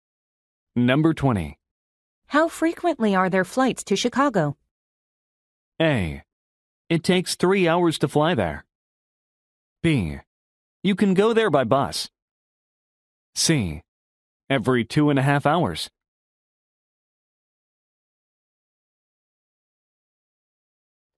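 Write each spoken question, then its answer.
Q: How frequently are there flights to Chicago?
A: C: Every 2.5 hours.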